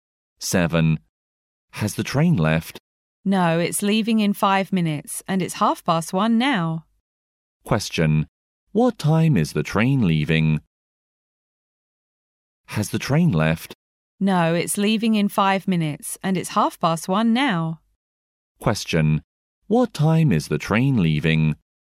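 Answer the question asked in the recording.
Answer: At 1:35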